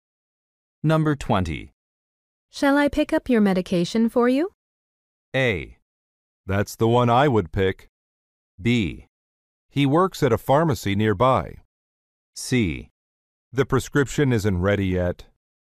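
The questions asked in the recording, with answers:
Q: Shall I pick up your medication for you?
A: C: The prescription isn't ready yet.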